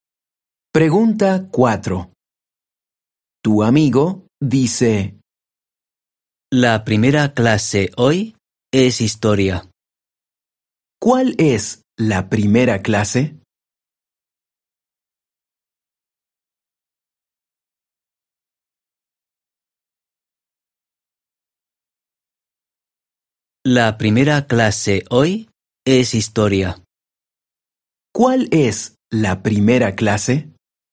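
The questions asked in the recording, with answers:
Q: ¿Cuál es la primera clase?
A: Historia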